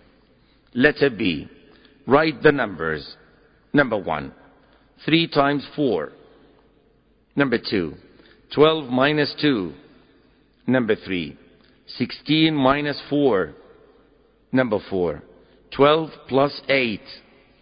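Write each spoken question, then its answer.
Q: Number 1. 3 times 4.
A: 12

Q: 12 minus 2.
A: 10

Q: Number 3. 16 minus 4.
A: 12

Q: Number 4. 12 plus 8.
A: 20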